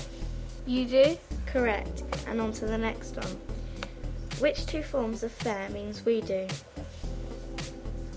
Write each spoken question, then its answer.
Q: Which two forms of faire means we do?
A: On fait et nous faisons.